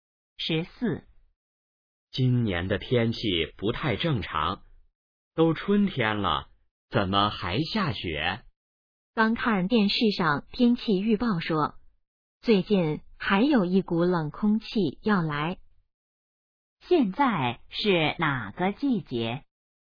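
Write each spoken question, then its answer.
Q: 现在是哪个季节?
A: 春天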